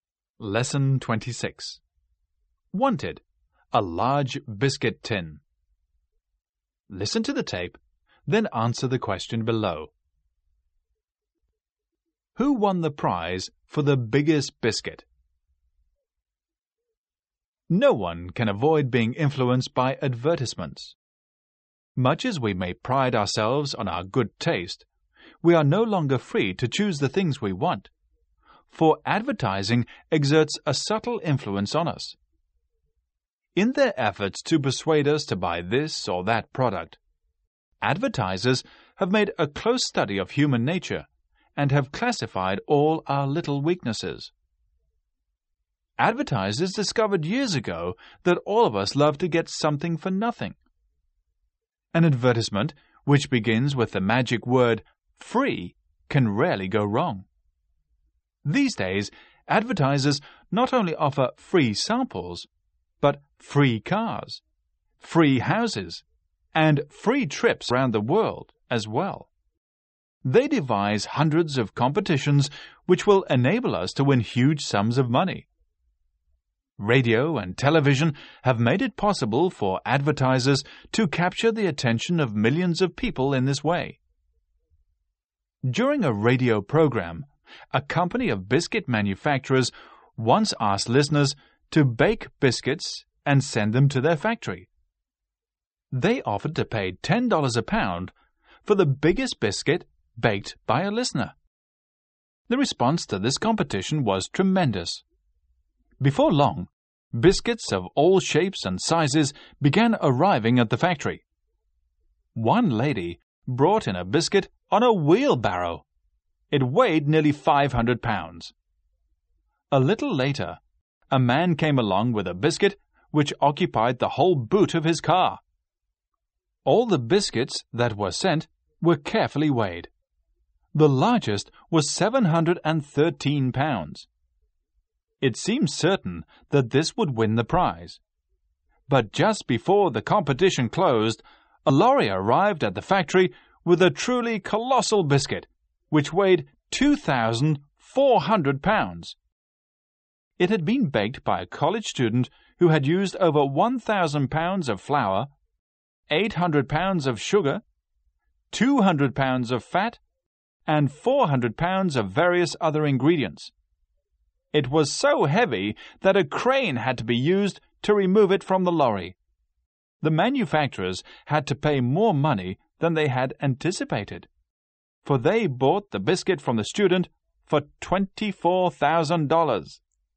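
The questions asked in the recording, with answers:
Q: Who won the prize for the biggest biscuit?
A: A college student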